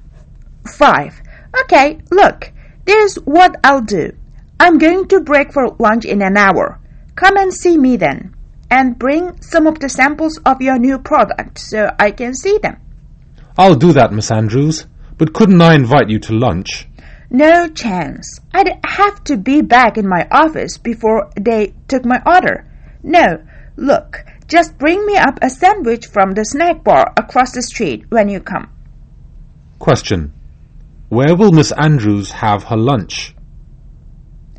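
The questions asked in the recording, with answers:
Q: Where will Miss Andrews have her lunch?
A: In her office (a sandwich)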